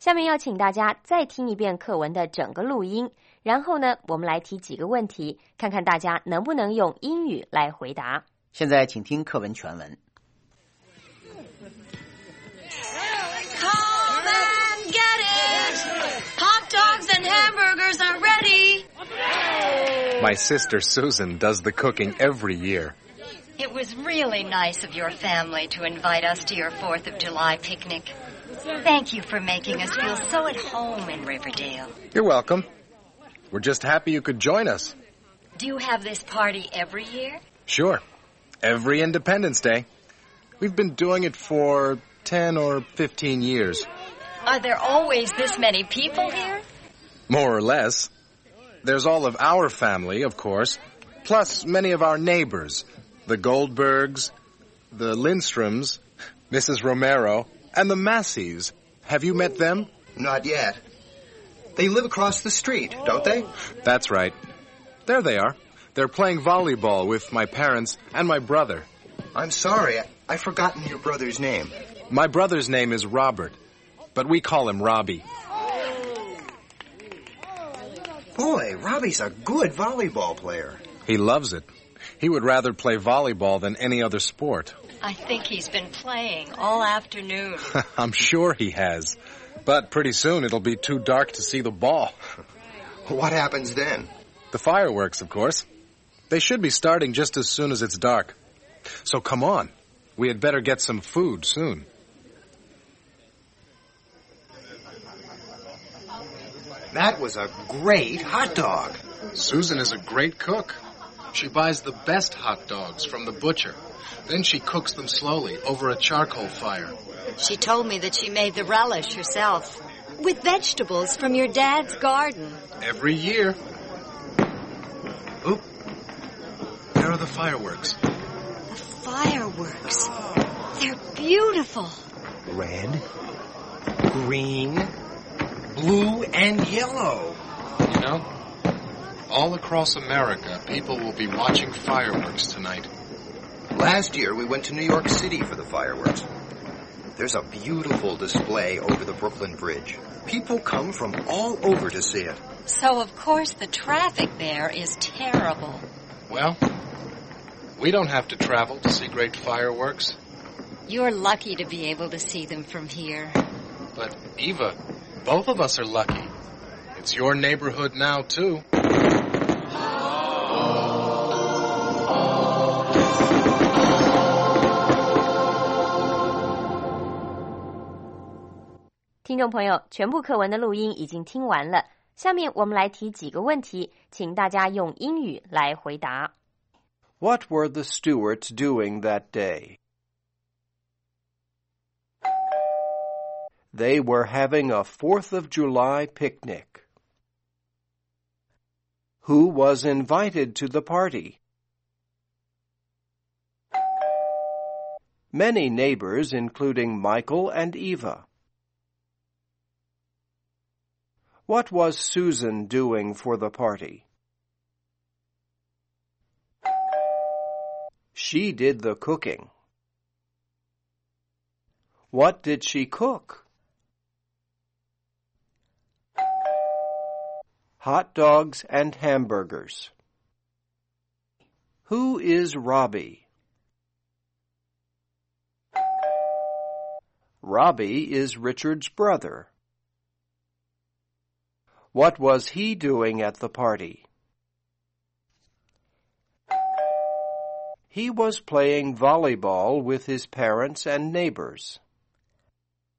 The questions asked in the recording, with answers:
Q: What were the Stewarts doing that day?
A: They were having a 4th of July picnic.

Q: Who was invited to the party?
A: Many neighbors, including Michael and Eva.

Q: What was Susan doing for the party?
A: She did the cooking.

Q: What did she cook?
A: Hot dogs and hamburgers.

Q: Who is Robbie?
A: Robbie is Richard's brother.